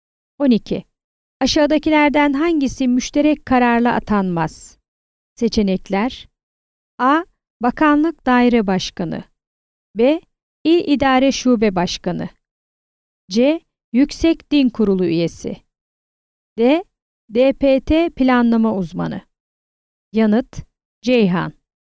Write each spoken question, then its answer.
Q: Aşağıdakilerden hangisi müşterek kararla atanmaz?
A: Yanıt: Ceyhan.